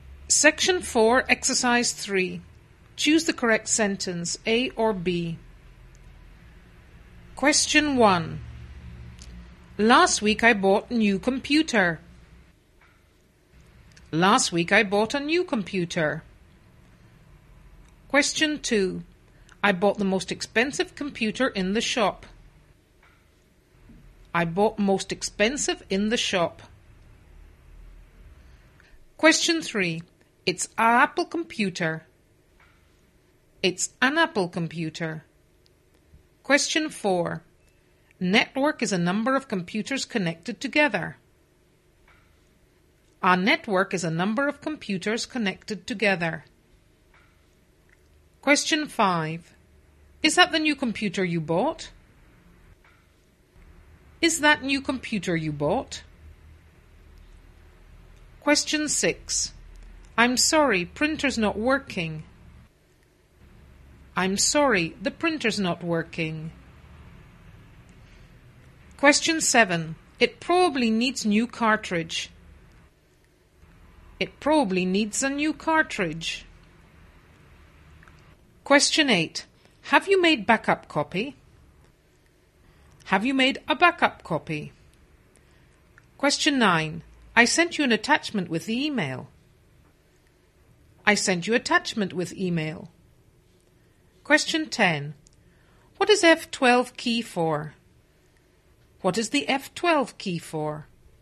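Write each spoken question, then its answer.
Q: I bought the most expensive computer in the shop.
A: A: I bought the most expensive computer in the shop.

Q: Network is a number of computers connected together.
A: B: A network is a number of computers connected together.

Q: Is that the new computer you bought?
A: A: Is that the new computer you bought?

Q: I'm sorry, printer's not working.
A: B: I'm sorry, the printer's not working.

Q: It probably needs new cartridge.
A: B: It probably needs a new cartridge.

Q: Have you made backup copy?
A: B: Have you made a backup copy?

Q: I sent you an attachment with the email.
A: A: I sent you an attachment with the email.

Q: What is F12 key for?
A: B: What is the F12 key for?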